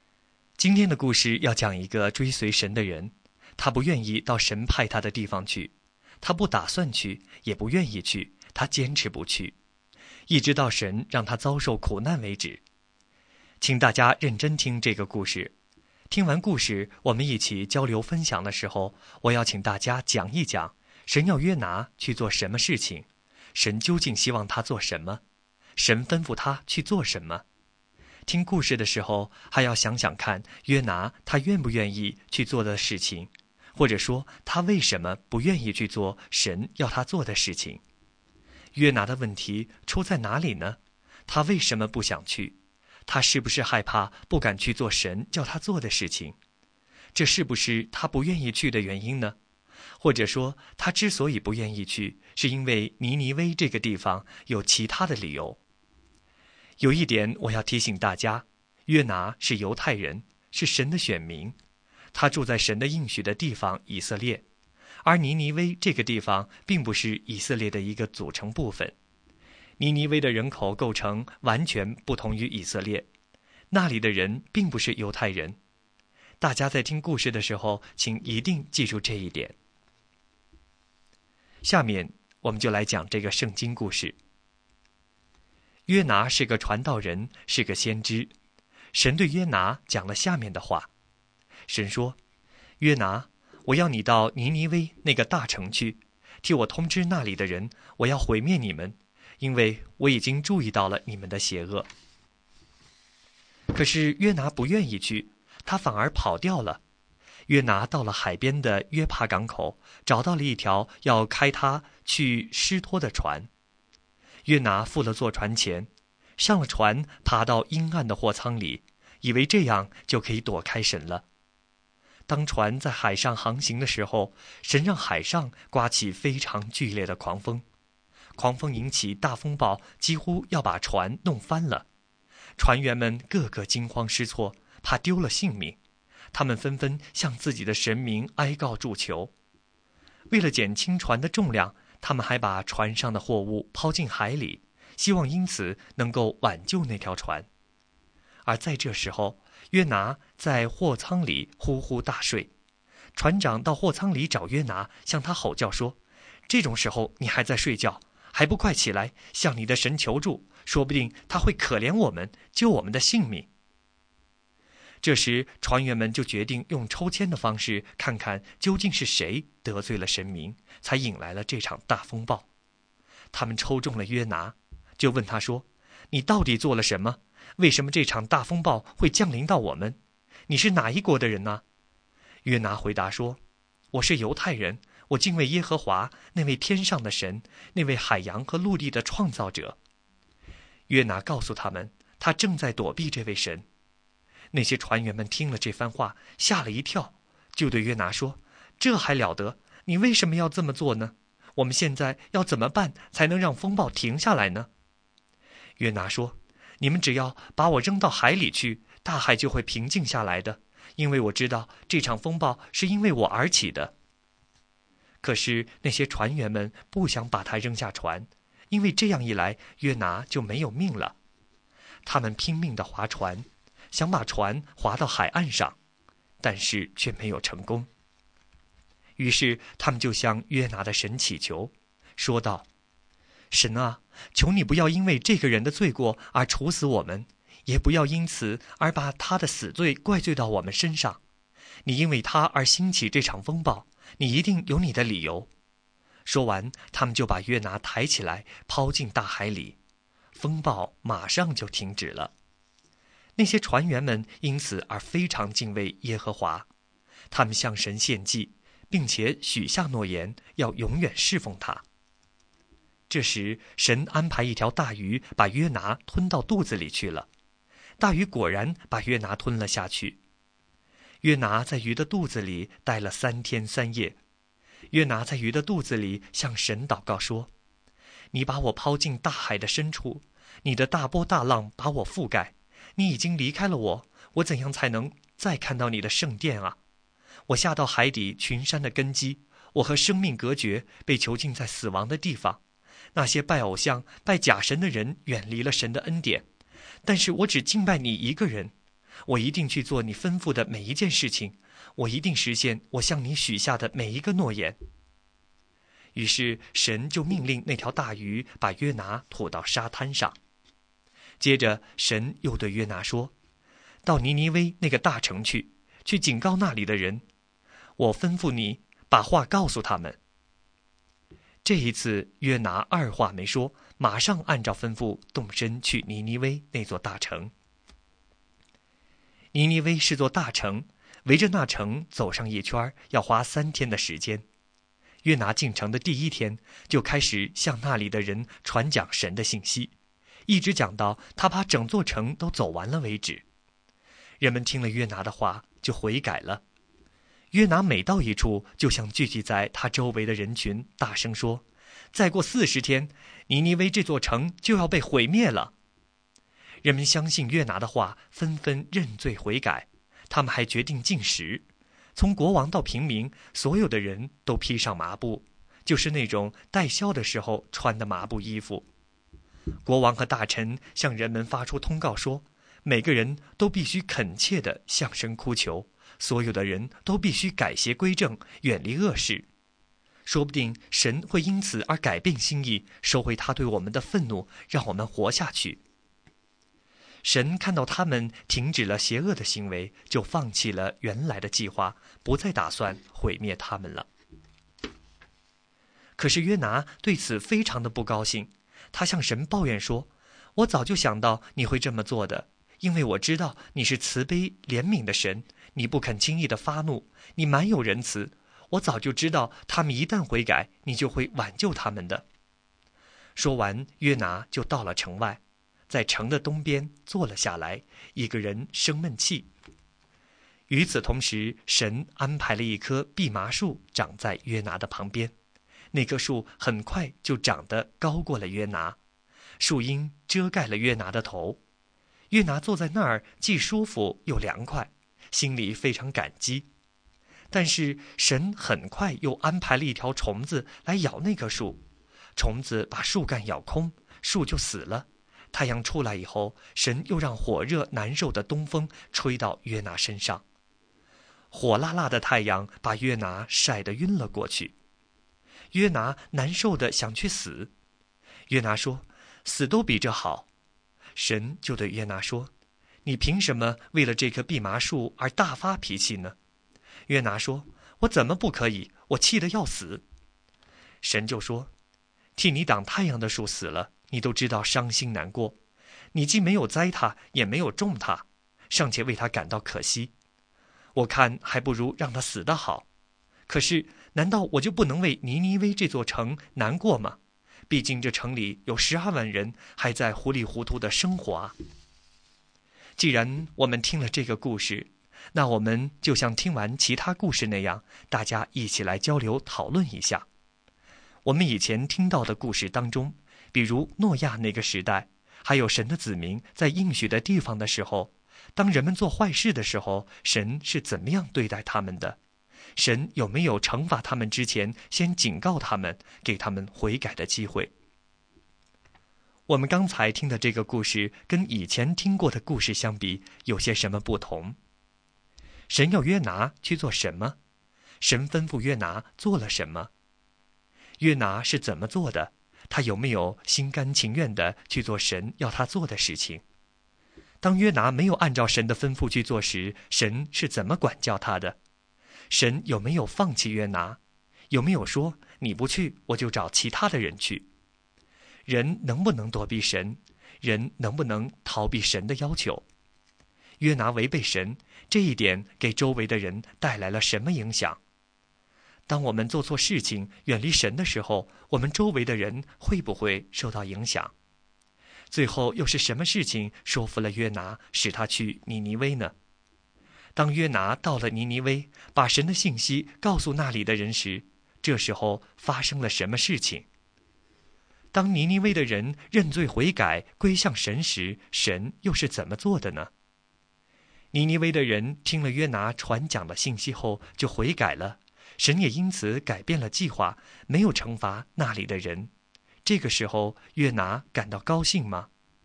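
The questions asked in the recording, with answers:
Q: 神要约拿去做什么?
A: 到尼尼微大城去,警告那里的人神要毁灭他们

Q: 约拿是怎么做的?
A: 他不愿意去,坐船逃往他施

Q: 当约拿没有按照神的吩咐去做时,神是怎么管教他的?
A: 神让海上起大风暴,约拿被抛进海里,被大鱼吞下三天三夜

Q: 当约拿到了尼尼微,把神的信息告诉那里的人时,这时候发生了什么事情?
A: 人们相信了,禁食、披麻布、认罪悔改

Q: 当尼尼微的人认罪悔改,归向神时,神又是怎么做的呢?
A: 尼尼微的人听了约拿传讲的信息后,就悔改了,神也因此改变了计划,没有惩罚那里的人

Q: 这个时候,约拿感到高兴吗?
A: 不高兴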